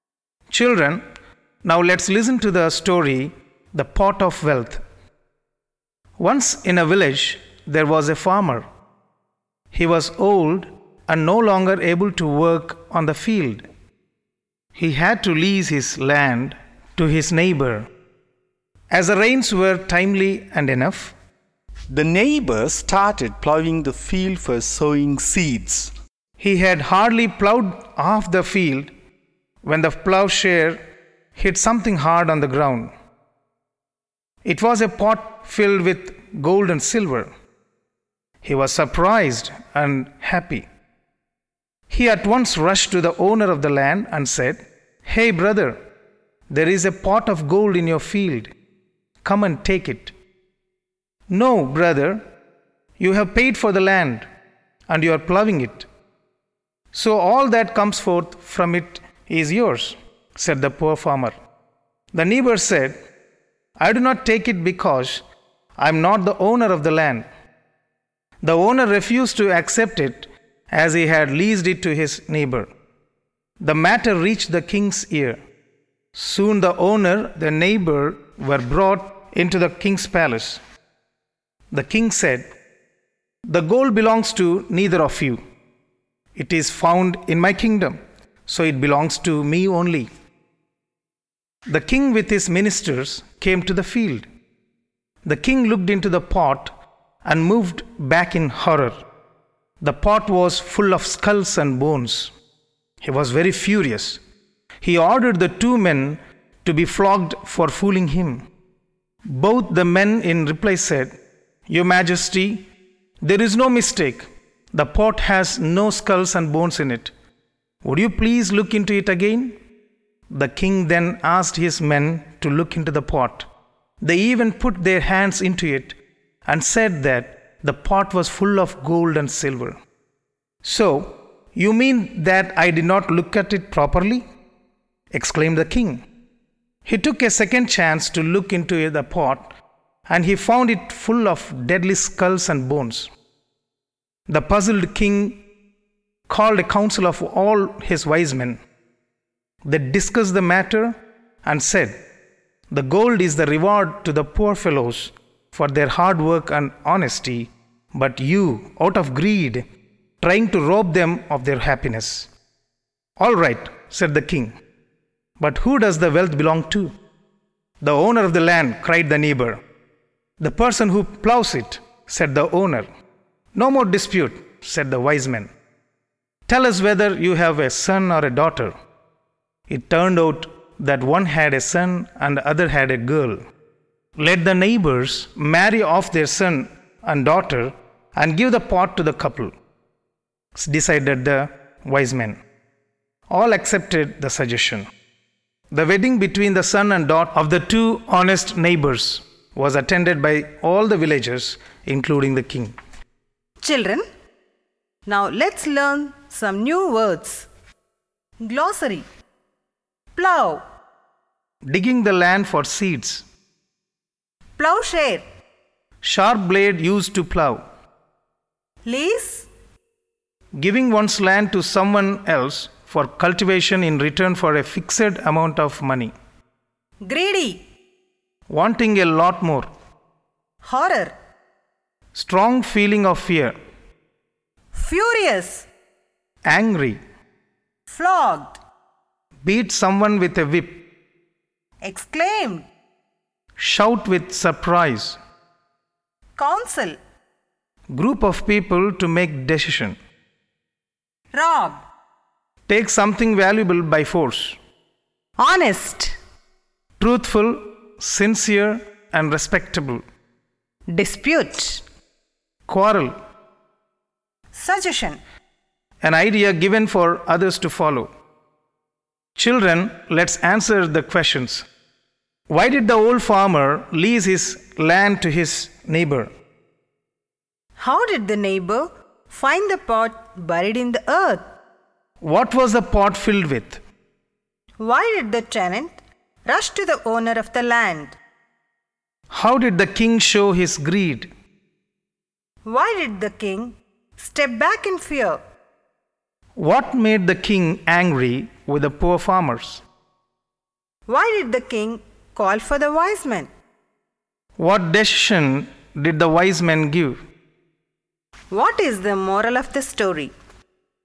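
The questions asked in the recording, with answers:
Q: Why did the old farmer lease his land to his neighbor?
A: He was old and no longer able to work on the field.

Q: How did the neighbor find the pot buried in the earth?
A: While plowing, the plowshare hit something hard in the ground.

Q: What was the pot filled with?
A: Gold and silver

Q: Why did the tenant rush to the owner of the land?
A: To tell him about the pot of gold and ask him to take it.

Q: How did the king show his greed?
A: He said the gold belonged to him because it was found in his kingdom.

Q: Why did the king step back in fear?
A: He saw the pot was full of skulls and bones.

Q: What made the king angry with the poor farmers?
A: He thought they were fooling him with a pot of skulls and bones.

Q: Why did the king call for the wise men?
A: He was puzzled because he saw skulls and bones while others saw gold.

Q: What decision did the wise men give?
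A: The son and daughter of the two neighbors should marry and get the pot.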